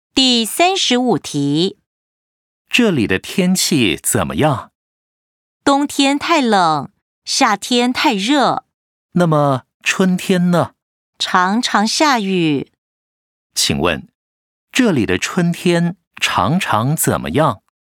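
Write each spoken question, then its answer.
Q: 请问,这里的春天常常怎么样?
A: 常常下雨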